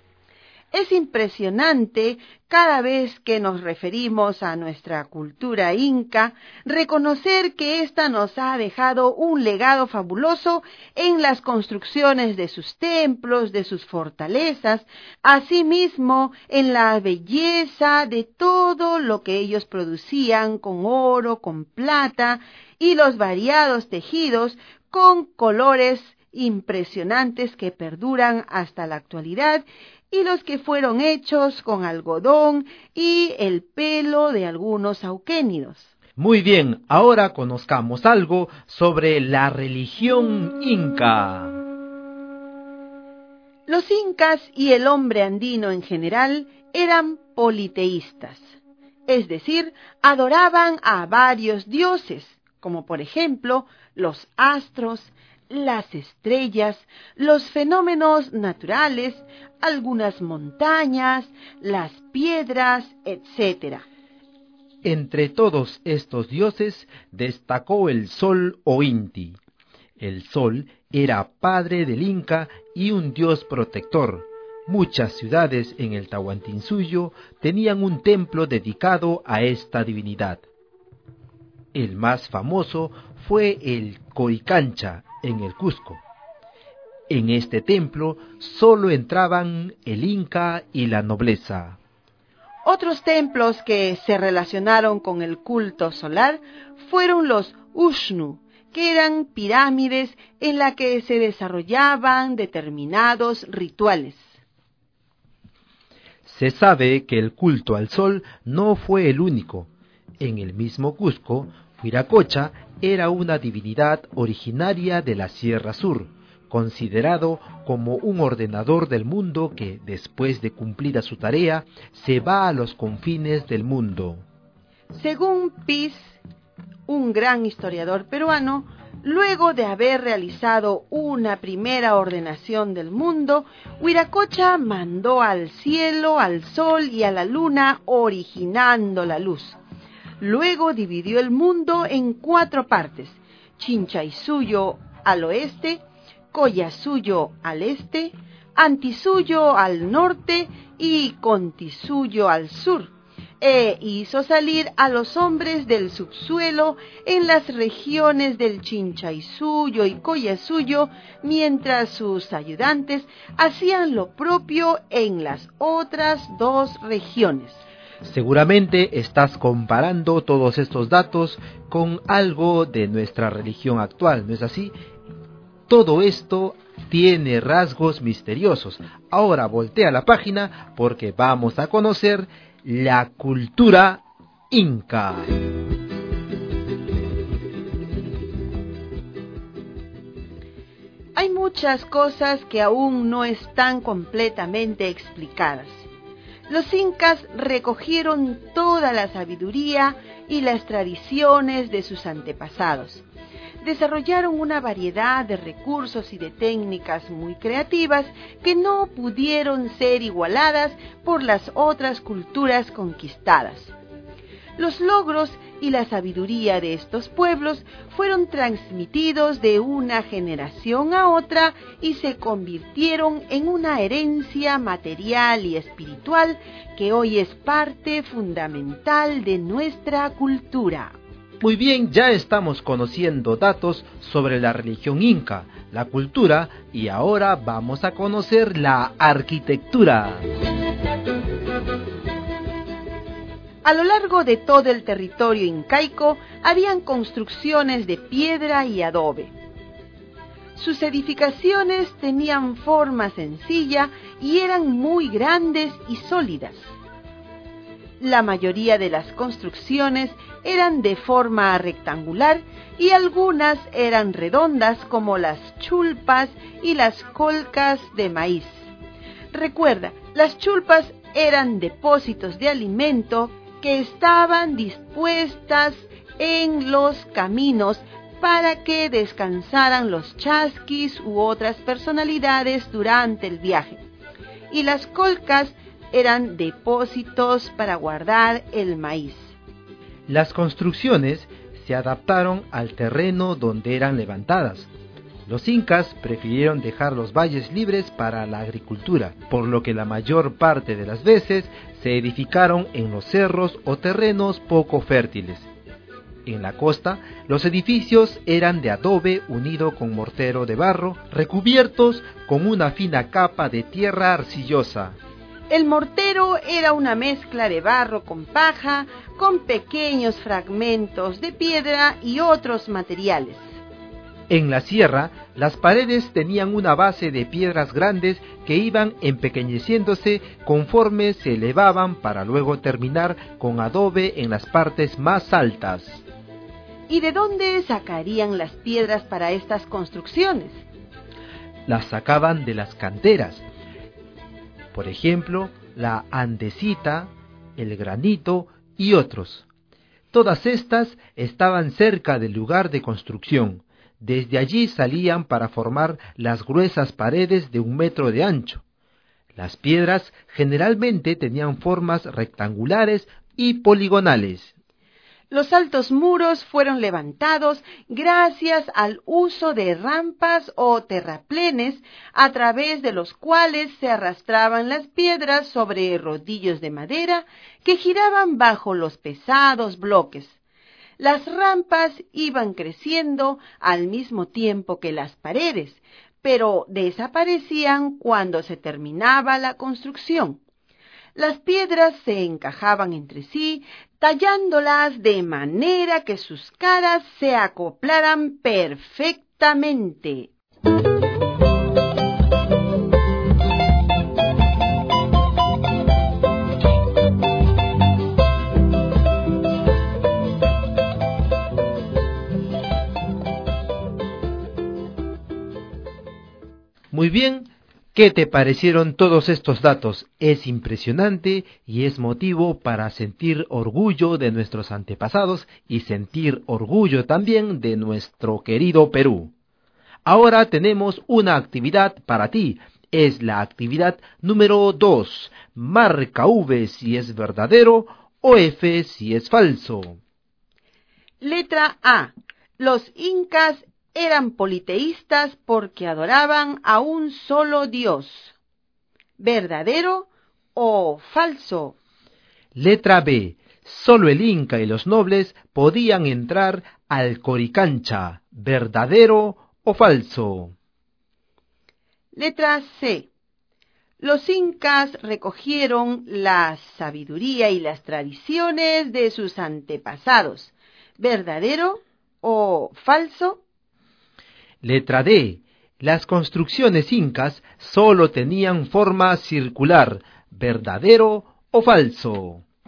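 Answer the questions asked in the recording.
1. Falso
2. Verdadero
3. Verdadero
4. Falso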